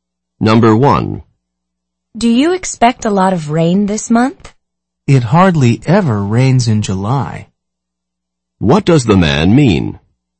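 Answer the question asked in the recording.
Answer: It almost never rains in July, so not much rain is expected.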